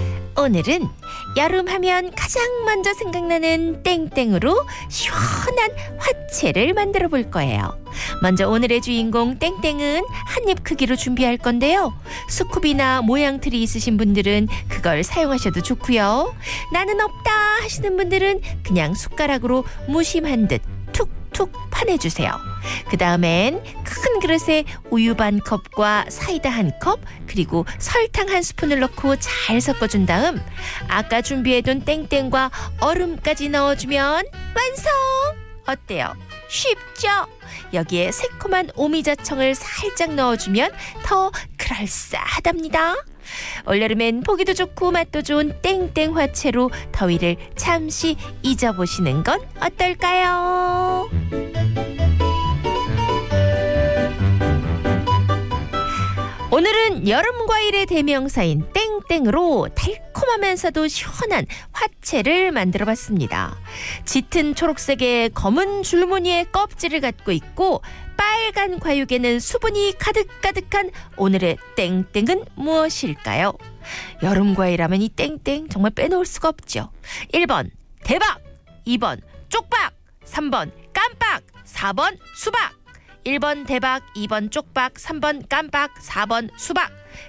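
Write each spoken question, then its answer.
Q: 짙은 초록색의 검은 줄무늬의 껍질을 갖고 있고 빨간 과육에는 수분이 가득가득한 오늘의 땡땡은 무엇일까요?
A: 4: 수박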